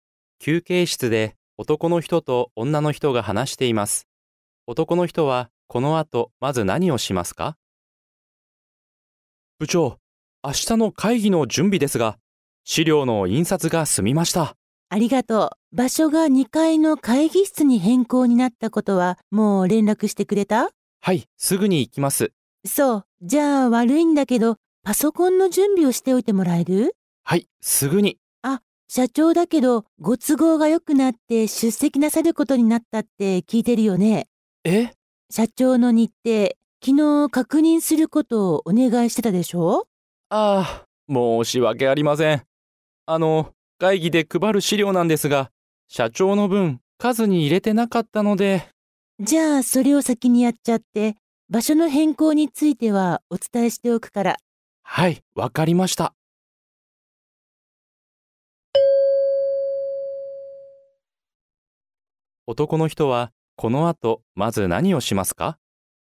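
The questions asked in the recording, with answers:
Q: 男の人は、この後、まず何をしますか?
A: 社長の分の資料を追加で印刷する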